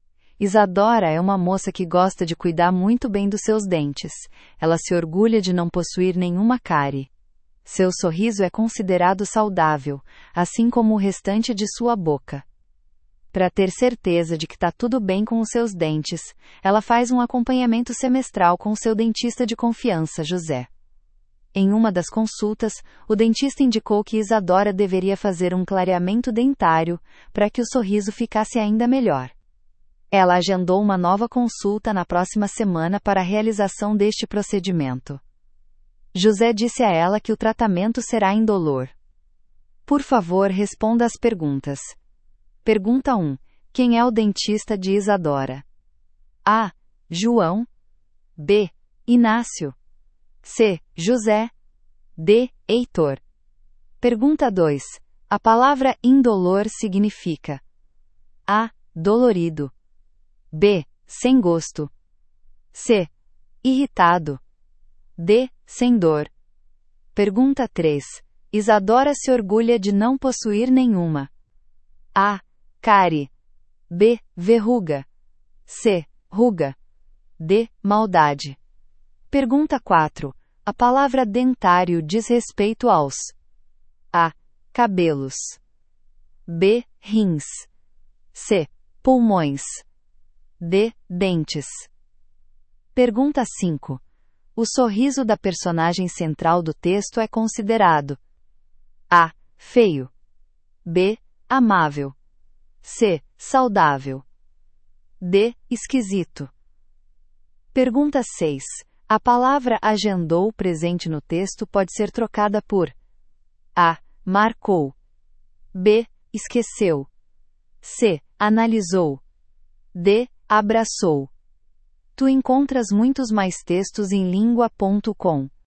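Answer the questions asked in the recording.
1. C: José
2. D: Sem dor
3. A: Cárie
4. D: Dentes
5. C: Saudável
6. A: Marcou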